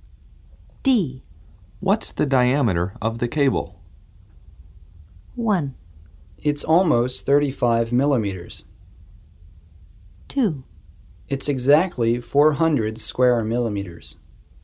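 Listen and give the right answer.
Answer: 1: It's almost 35 millimeters.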